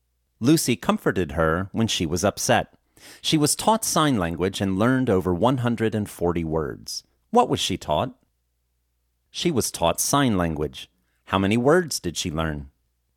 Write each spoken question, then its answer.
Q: How many words did she learn?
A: She learned over 140 words.